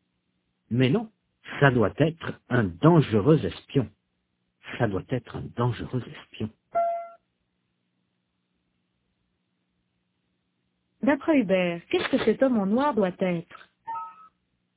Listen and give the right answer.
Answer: Un dangereux espion?